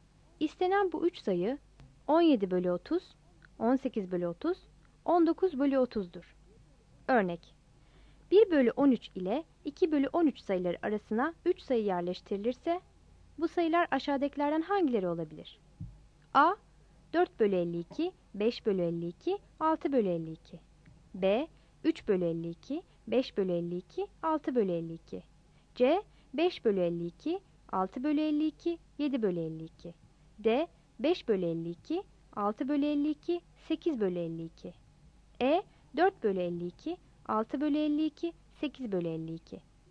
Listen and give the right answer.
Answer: Yanıt C'dir.